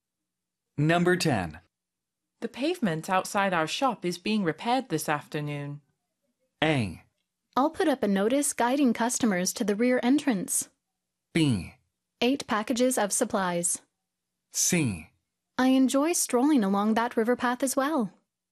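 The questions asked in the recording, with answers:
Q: The pavement outside our shop is being repaired this afternoon.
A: A: I'll put up a notice guiding customers to the rear entrance.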